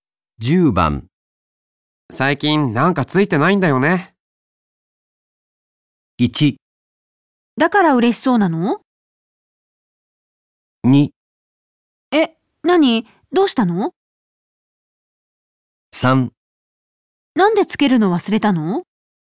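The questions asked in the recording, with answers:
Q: 最近なんかついてないんだよね。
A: 2: え、何どうしたの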